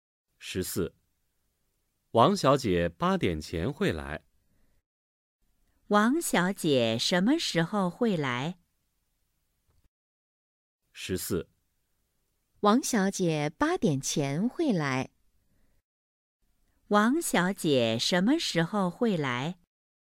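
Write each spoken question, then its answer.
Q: 王小姐什么时候会来?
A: 八点前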